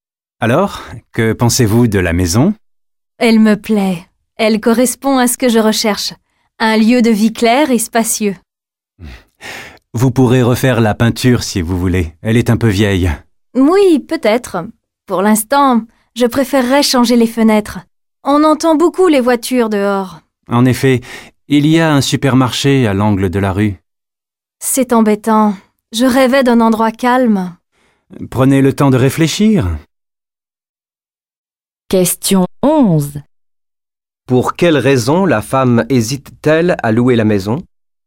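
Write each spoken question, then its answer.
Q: Pour quelle raison la femme hésite-t-elle à louer la maison ?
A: Parce qu'elle est bruyante : on entend beaucoup les voitures, et elle voulait un endroit calme.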